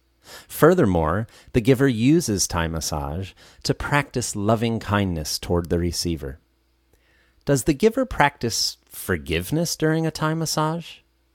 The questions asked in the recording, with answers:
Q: Does the giver practice forgiveness during a Thai massage?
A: Well, not exactly. Instead, the giver practices loving kindness toward the receiver.